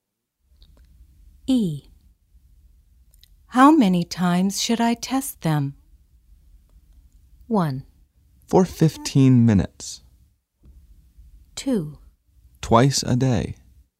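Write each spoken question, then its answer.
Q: How many times should I test them?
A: 2: Twice a day.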